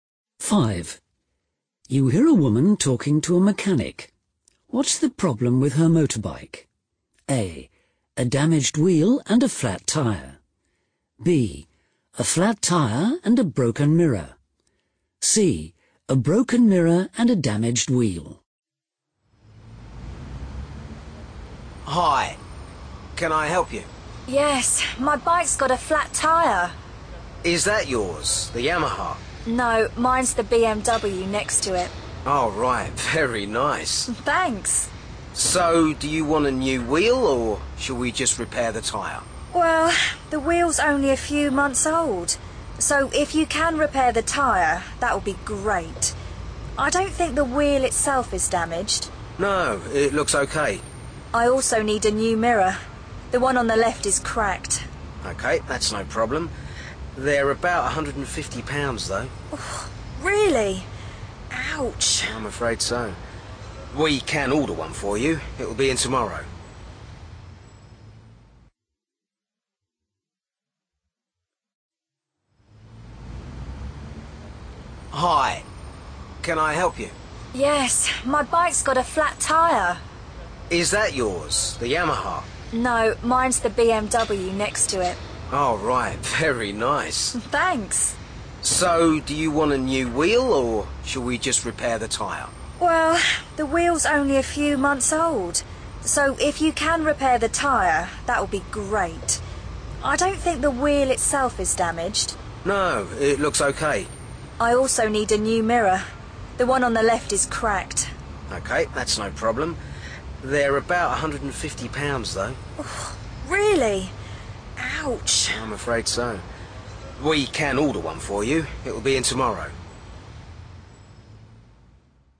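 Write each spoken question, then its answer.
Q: What's the problem with her motorbike?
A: B: A flat tire and a broken mirror.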